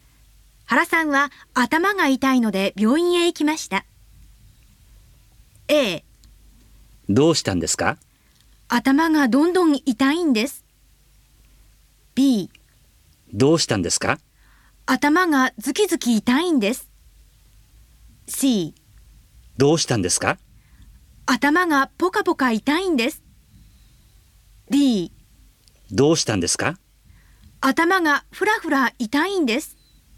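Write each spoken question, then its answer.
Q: 原さんは頭が痛いので病院へ行きました。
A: B: 頭がズキズキ痛いんです。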